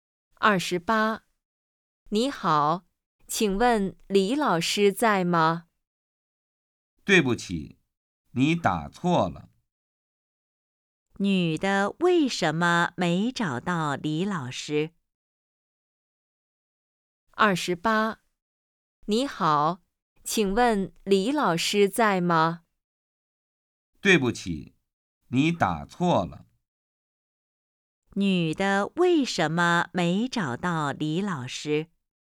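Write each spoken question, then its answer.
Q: 女的为什么没找到李老师?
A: 电话打错了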